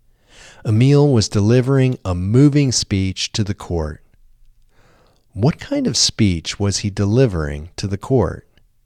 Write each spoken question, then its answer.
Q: What kind of speech was he delivering to the court?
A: He was delivering a moving speech to the court.